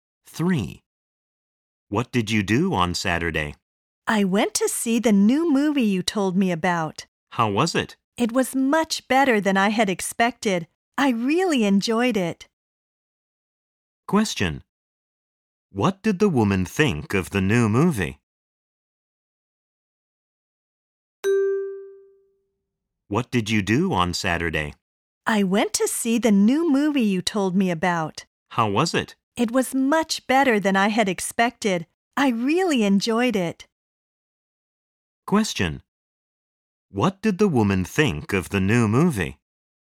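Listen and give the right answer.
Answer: It was much better than she had expected; she really enjoyed it.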